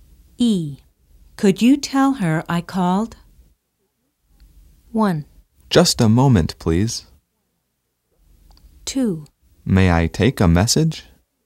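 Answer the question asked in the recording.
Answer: 2: May I take a message?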